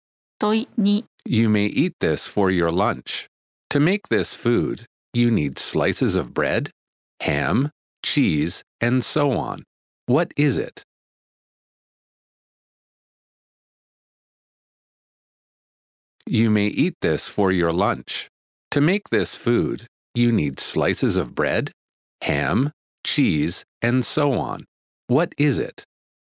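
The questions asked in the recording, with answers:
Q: What is it?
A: A sandwich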